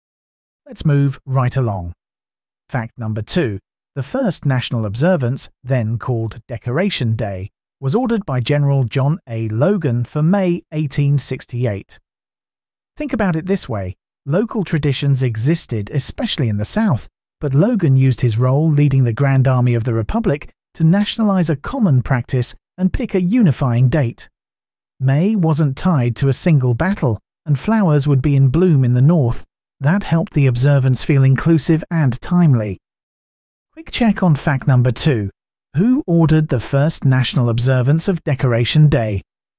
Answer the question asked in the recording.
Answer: General John A.